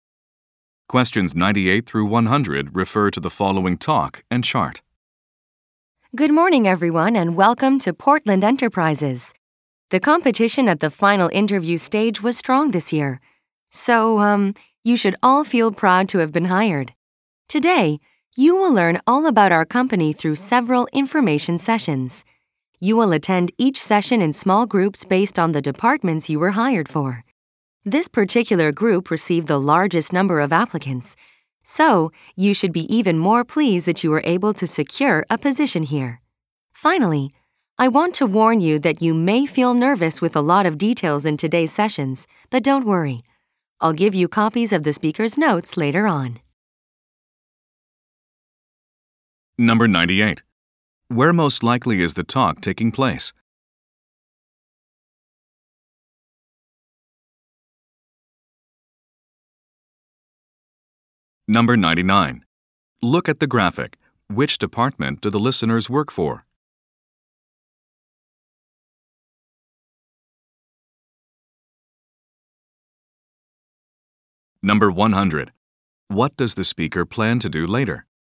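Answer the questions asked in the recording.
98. At an orientation for new employees
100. Give out copies of the speaker's notes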